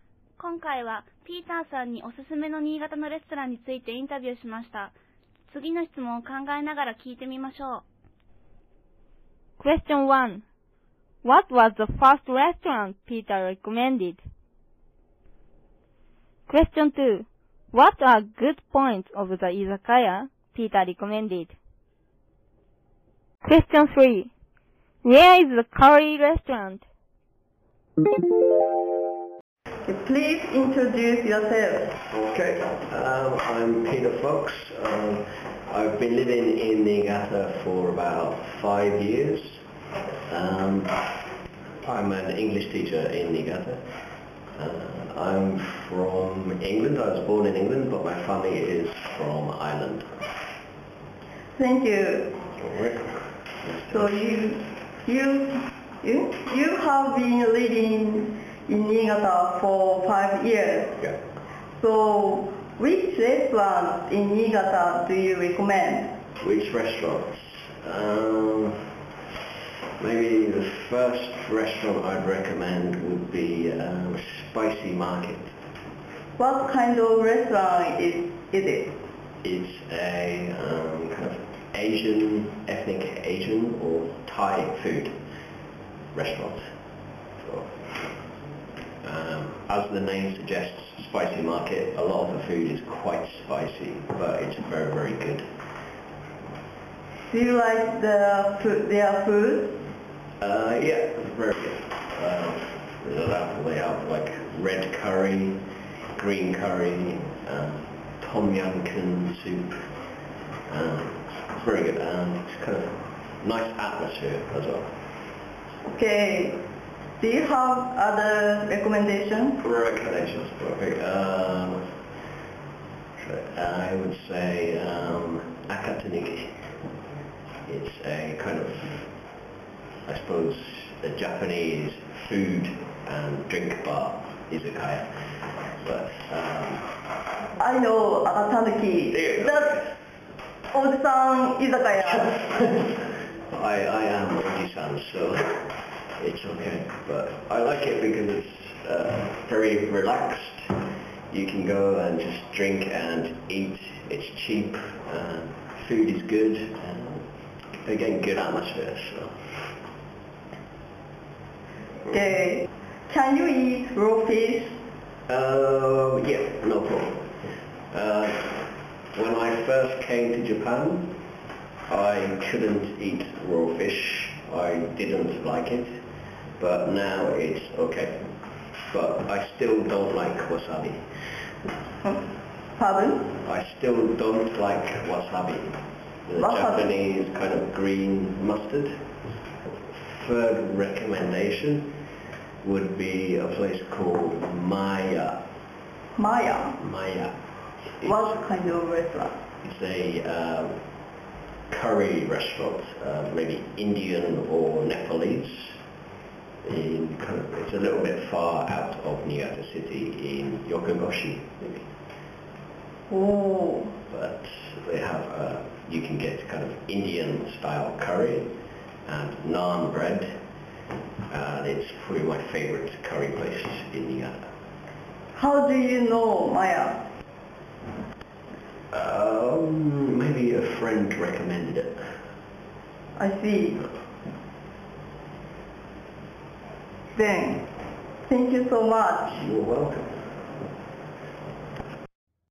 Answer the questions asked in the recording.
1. It was spicy market.
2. Very relaxed. You can go and just drink and eat. Cheap. Food is good. And good atmosphere.
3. It's in 横郷市。